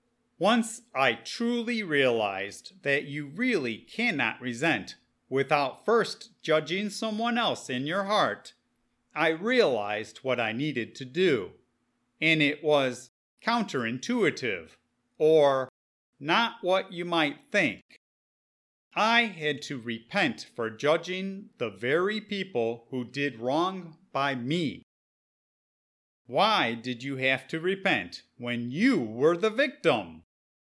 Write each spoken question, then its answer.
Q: Why did you have to repent when you were the victim?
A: Even though I may have been a victim, I was not innocent because I judged the people who did me wrong in my heart.